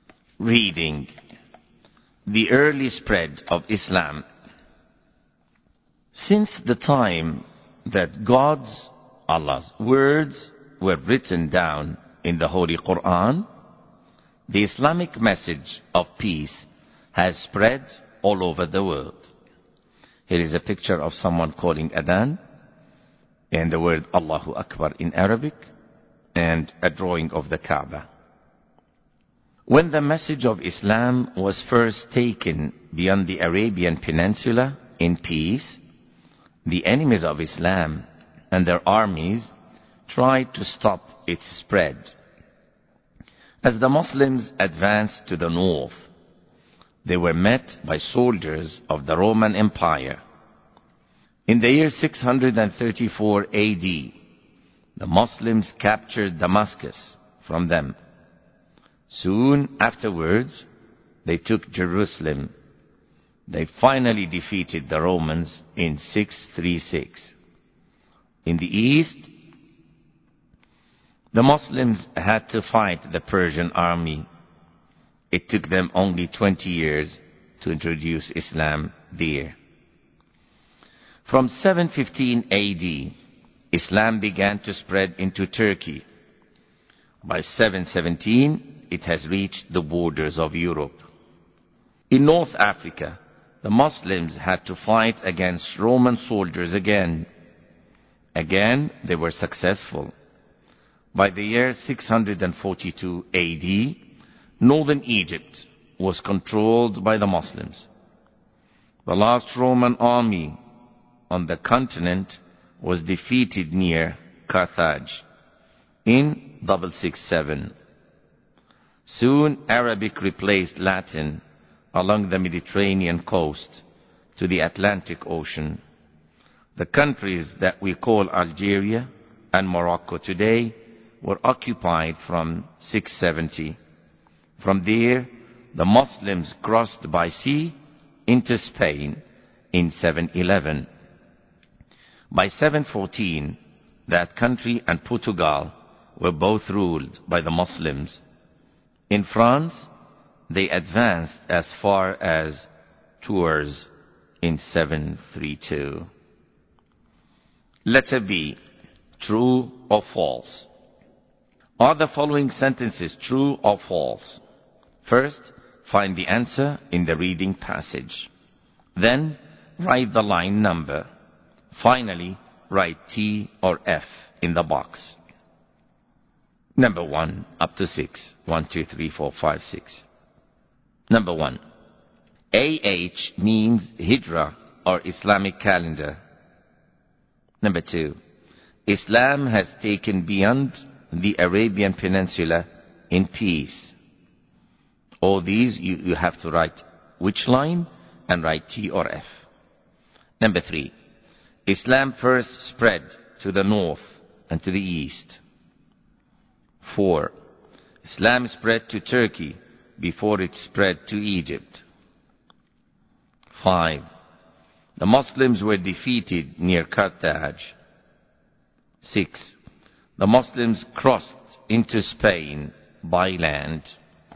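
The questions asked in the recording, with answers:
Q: Islam has taken beyond the Arabian Peninsula in peace.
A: True

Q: Islam spread to Turkey before it spread to Egypt.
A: False

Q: The Muslims were defeated near Carthage.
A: False

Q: The Muslims crossed into Spain by land.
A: False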